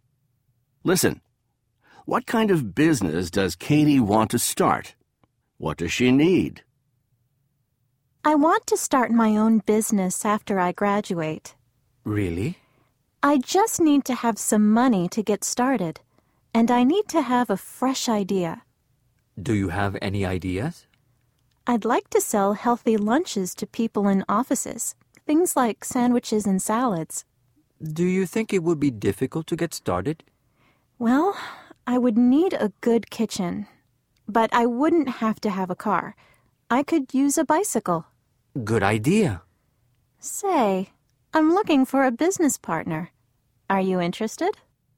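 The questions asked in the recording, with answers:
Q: What kind of business does Katie want to start?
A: Selling healthy lunches (sandwiches and salads) to people in offices

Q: What does she need?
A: Some money, a fresh idea, and a good kitchen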